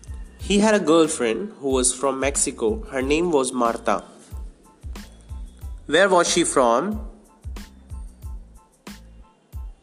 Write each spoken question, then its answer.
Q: Where was she from?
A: She was from Mexico.